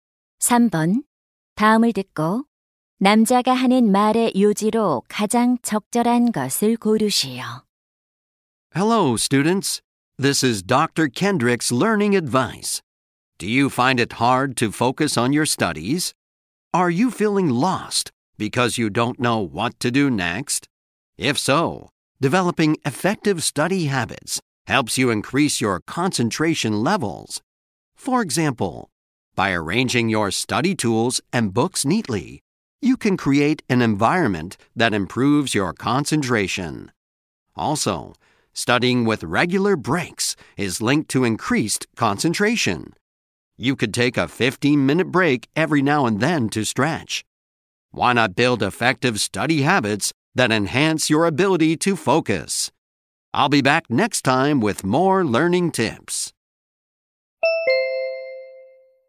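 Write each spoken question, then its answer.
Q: 다음을 듣고 남자가 하는 말의 요지로 가장 적절한 것을 고르시오.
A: 효과적인 학습 습관은 집중력을 높여 준다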